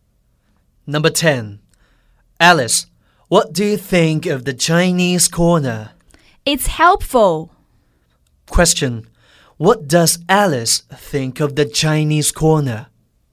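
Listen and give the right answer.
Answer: It's helpful.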